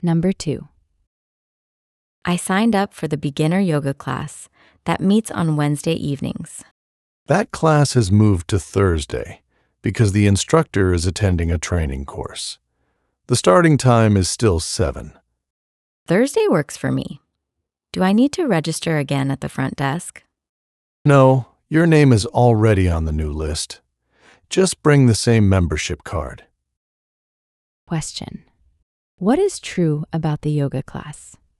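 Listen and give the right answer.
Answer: It has moved from Wednesday to Thursday, still starting at 7.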